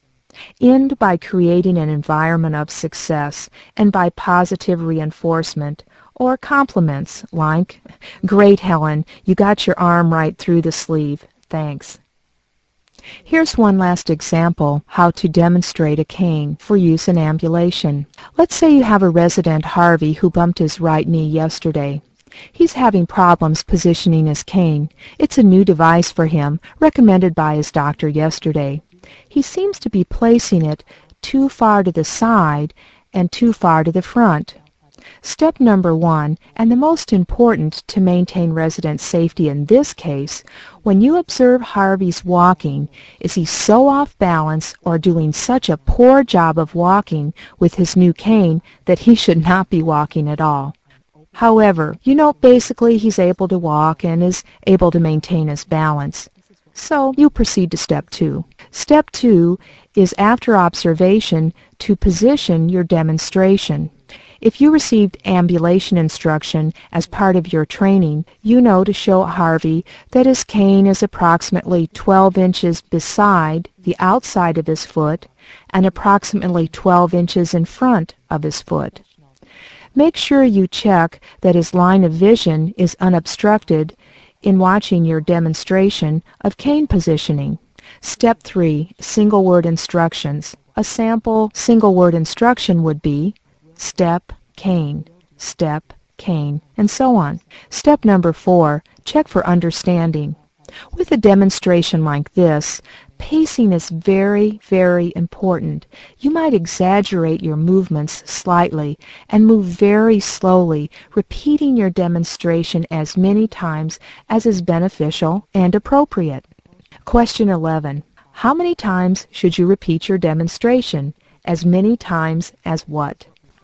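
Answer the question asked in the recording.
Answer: As many times as is beneficial and appropriate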